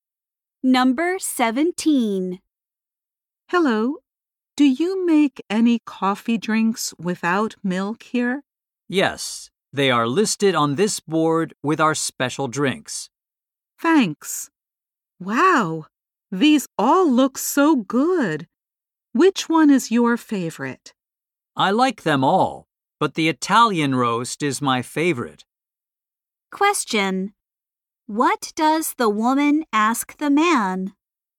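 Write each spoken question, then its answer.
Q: What does the woman ask the man?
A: Which coffee drink is his favorite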